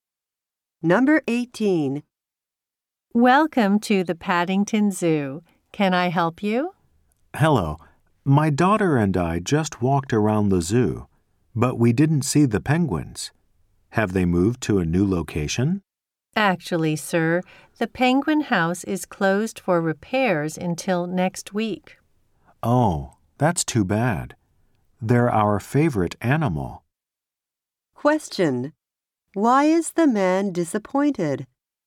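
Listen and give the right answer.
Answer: The penguin house is closed for repairs.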